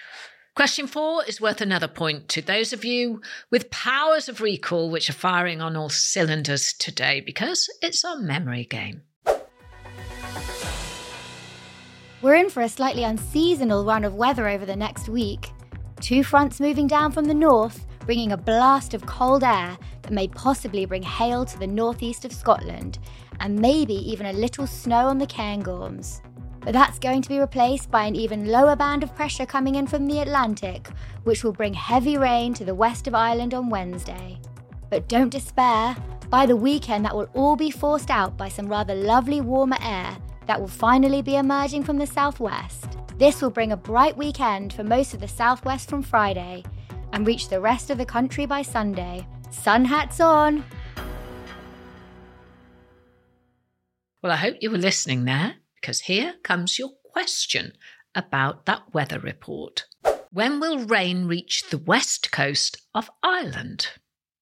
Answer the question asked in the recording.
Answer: Did you remember the answer was Wednesday?